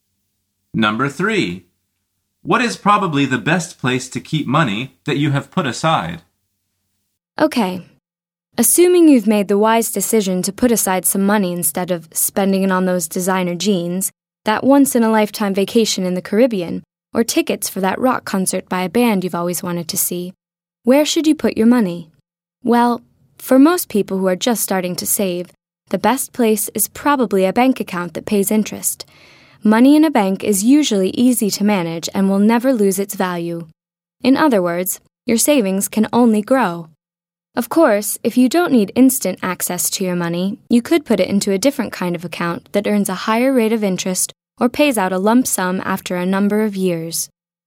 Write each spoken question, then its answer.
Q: What is probably the best place to keep money that you have put aside?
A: The answer is in a bank account that pays interest.